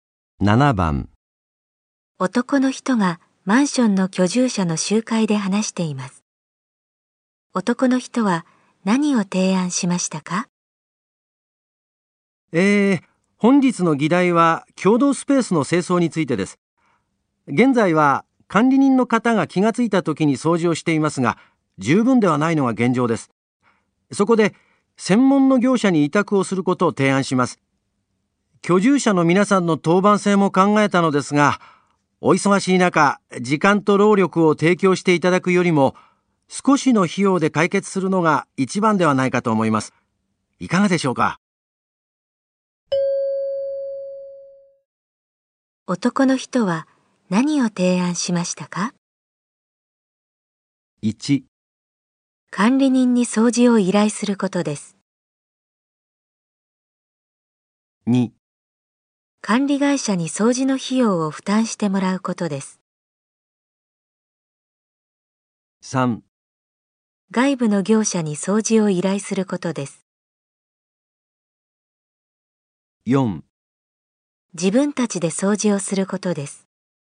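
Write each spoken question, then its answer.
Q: を提案しましたか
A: 3: 外部の業者に掃除を依頼することです。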